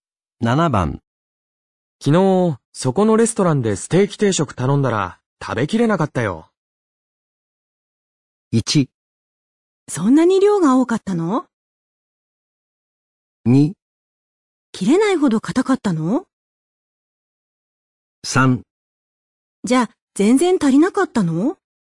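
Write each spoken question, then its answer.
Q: 昨日、そこのレストランでステーキ定食頼んだら、食べきれなかったよ。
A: 1: そんなに量が多かったの?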